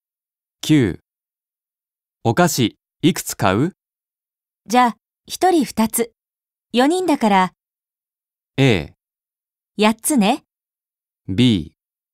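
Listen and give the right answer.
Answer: A: 8つね。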